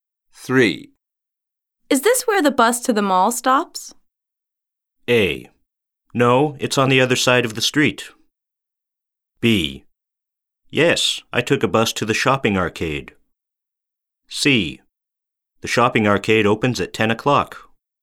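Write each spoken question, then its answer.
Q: Is this where the bus to the mall stops?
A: A: No, it's on the other side of the street.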